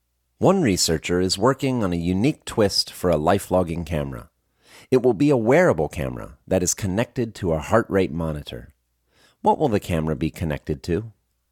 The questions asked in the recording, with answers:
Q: What will the camera be connected to?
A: The camera will be connected to a heart rate monitor.